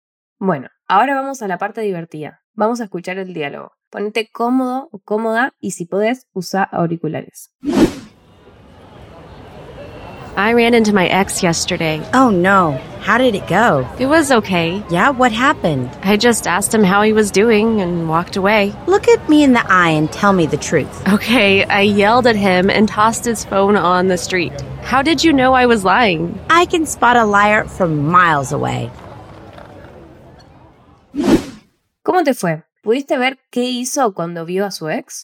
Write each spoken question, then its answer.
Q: ¿Pudiste ver qué hizo cuando vio a su ex?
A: Okay, I yelled at him and tossed his phone on the street.